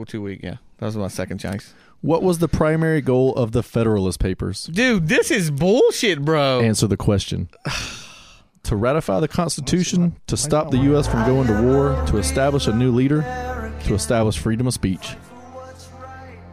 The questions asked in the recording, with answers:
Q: What was the primary goal of the Federalist Papers?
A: It is to ratify the Constitution.